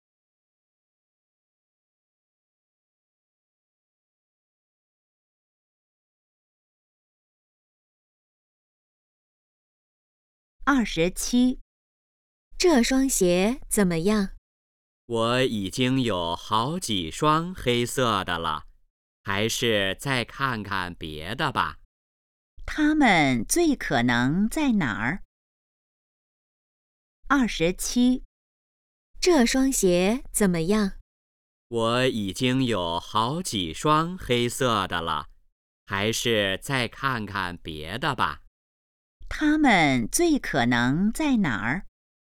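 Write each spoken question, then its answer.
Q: 他们最可能在哪儿?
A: 商店(鞋店)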